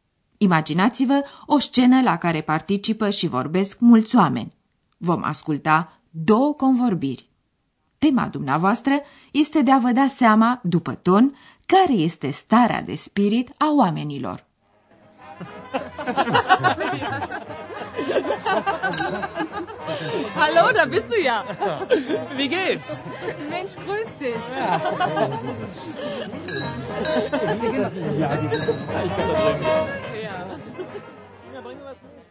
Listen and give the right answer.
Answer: Oamenii sunt veseli, nu-i așa?